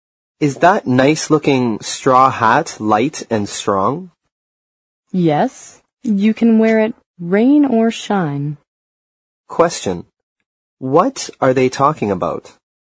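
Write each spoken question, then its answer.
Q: What are they talking about?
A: A straw hat.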